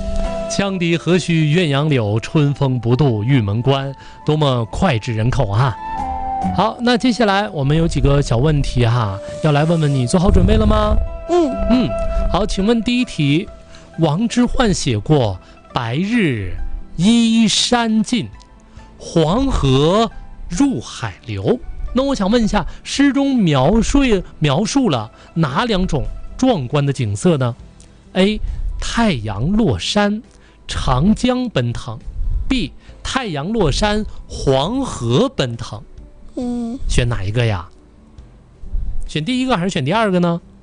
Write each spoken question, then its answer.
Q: 王之涣写过《白日依山尽,黄河入海流》,那我想问一下,诗中描述了哪两种壮观的景色呢?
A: 选第二个。